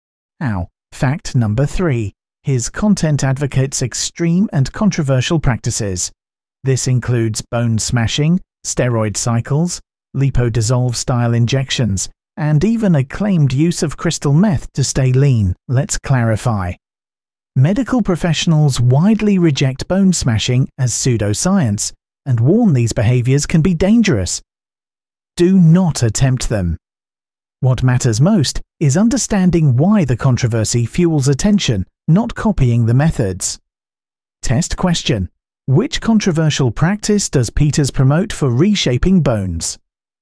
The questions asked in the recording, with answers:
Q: Which controversial practice does Peters promote for reshaping bones?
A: Correct answer. Bone smashing.